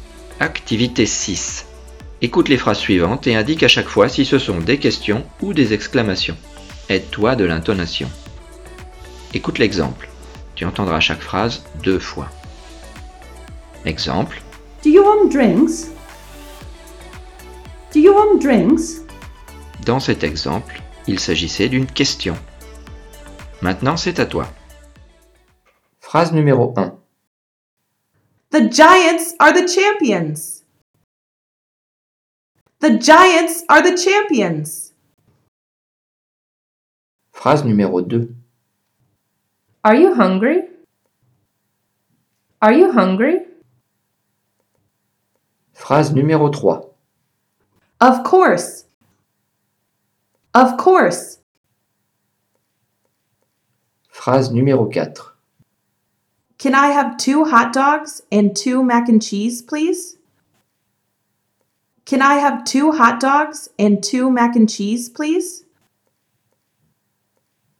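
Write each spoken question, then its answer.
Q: Écoute les phrases suivantes et indique à chaque fois si ce sont des questions ou des exclamations.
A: question

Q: Écoute les phrases suivantes et indique à chaque fois si ce sont des questions ou des exclamations.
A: question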